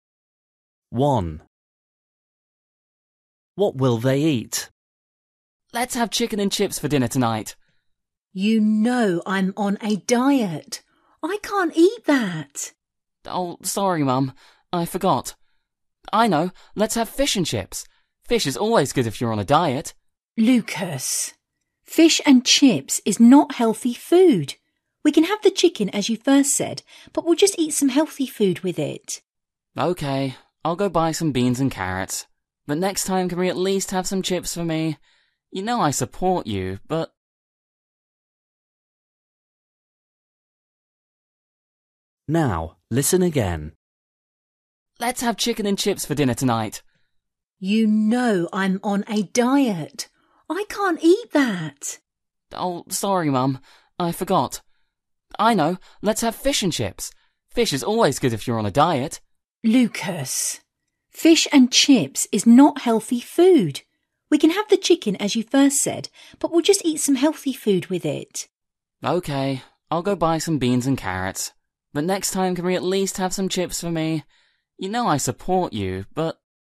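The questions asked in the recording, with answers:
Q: What will they eat?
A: chicken with beans and carrots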